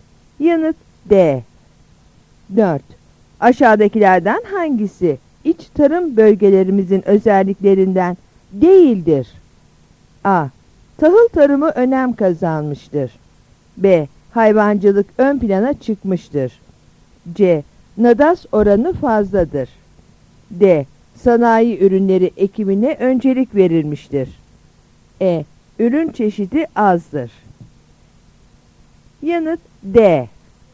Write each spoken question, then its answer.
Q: Aşağıdakilerden hangisi iç tarım bölgelerimizin özelliklerinden değildir?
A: Yanıt D.